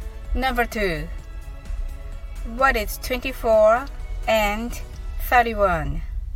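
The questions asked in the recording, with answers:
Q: What is 24 and 31?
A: 55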